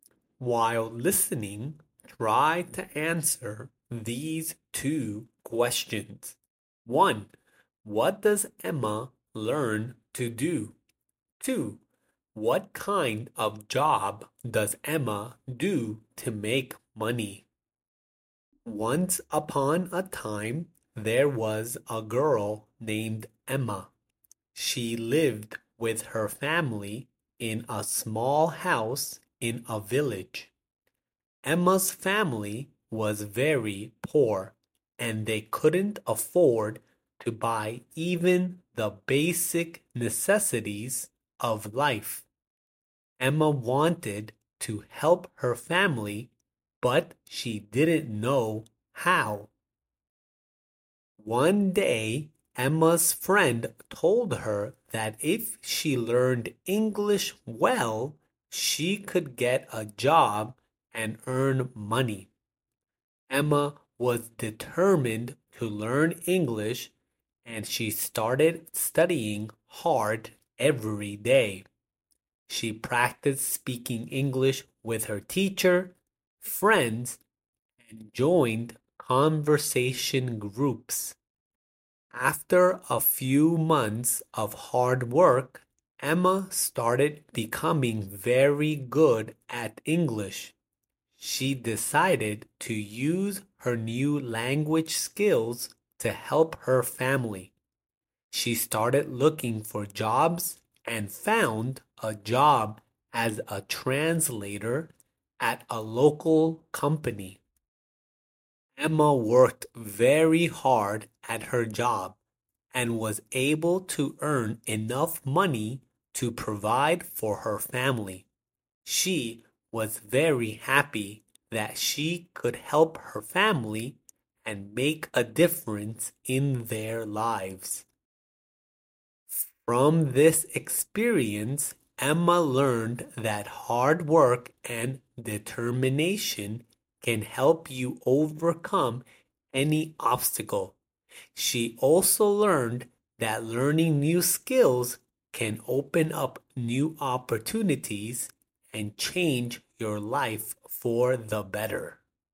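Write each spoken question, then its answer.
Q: What does Emma learn to do?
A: Speak English

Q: What kind of job does Emma do to make money?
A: Translator at a local company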